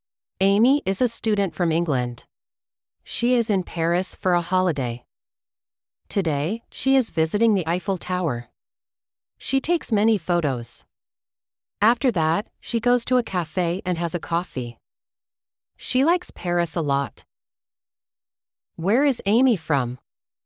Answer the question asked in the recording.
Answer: She is from England.